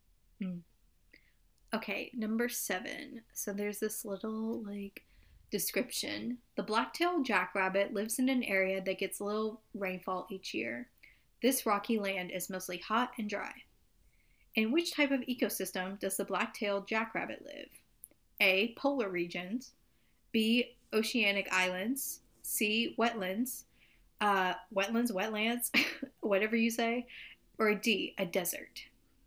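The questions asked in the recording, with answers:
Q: In which type of ecosystem does the black-tailed jackrabbit live?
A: D: a desert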